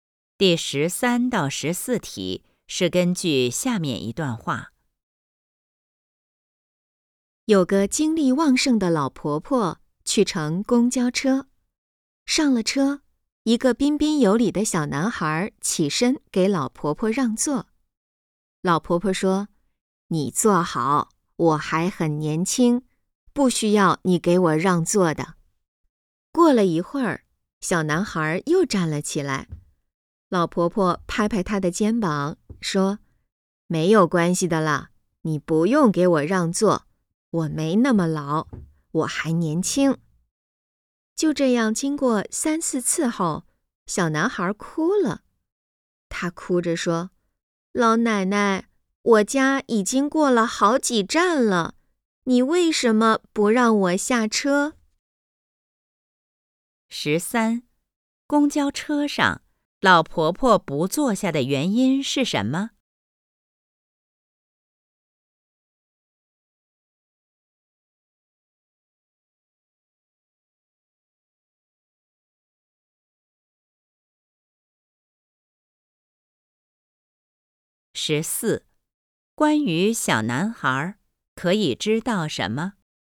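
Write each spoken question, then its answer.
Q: 公交车上,老婆婆不坐下的原因是什么?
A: 她觉得自己还年轻,不需要让座

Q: 关于小男孩,可以知道什么?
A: 他想下车,已经坐过了好几站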